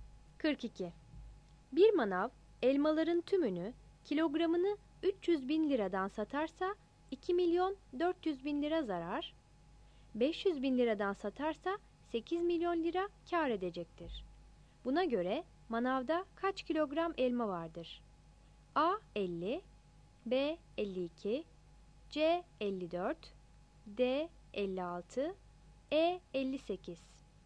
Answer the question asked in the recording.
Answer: 42 B